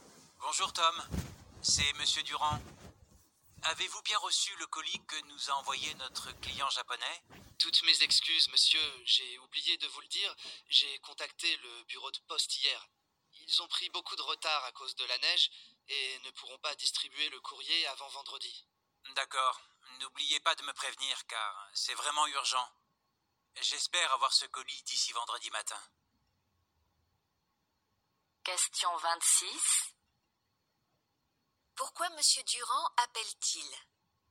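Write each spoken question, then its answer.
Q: Pourquoi Monsieur Durand appelle-t-il ?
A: Pour savoir si Tom a bien reçu le colis envoyé par le client japonais.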